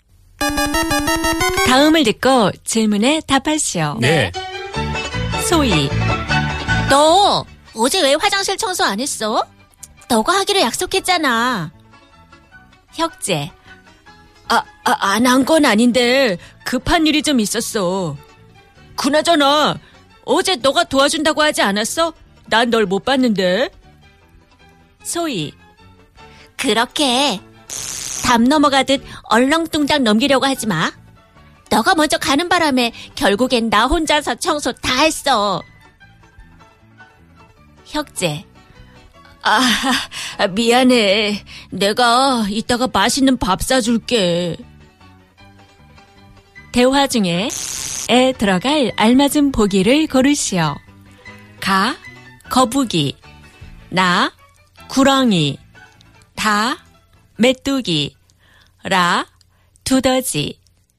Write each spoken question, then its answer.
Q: 대화 중에 에 들어갈 알맞은 보기를 고르시오.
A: It is kurogi.